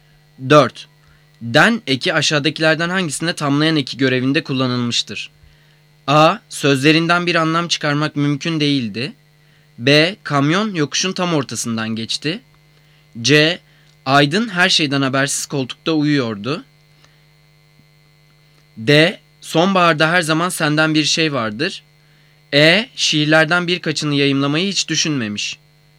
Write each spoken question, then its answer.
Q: Den eki aşağıdakilerden hangisinde tamlayan eki görevinde kullanılmıştır?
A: Cevap E. Şiirlerden birkaçını yayımlamayı hiç düşünmemiş.